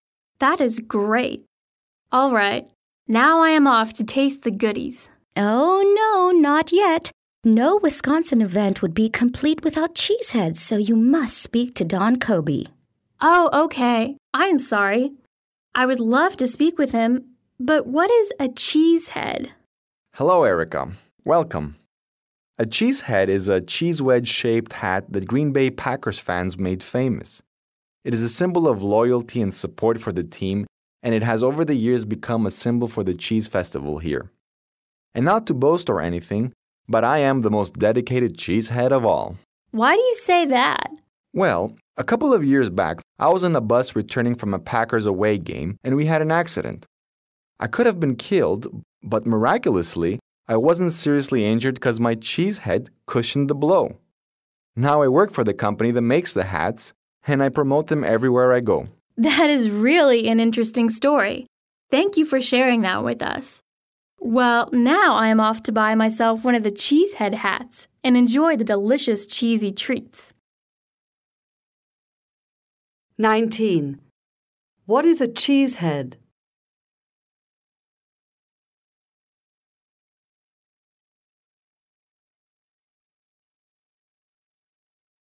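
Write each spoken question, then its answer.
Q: What is a Cheesehead?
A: A hat shaped like a wedge of cheese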